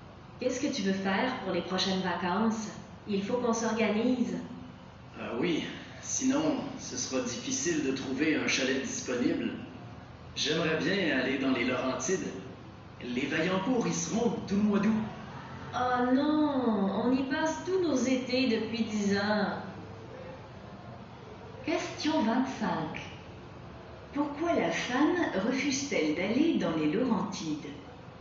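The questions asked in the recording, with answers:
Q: Pourquoi la femme refuse-t-elle d'aller dans les Laurentides?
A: Parce qu'ils y passent tous leurs étés depuis 10 ans.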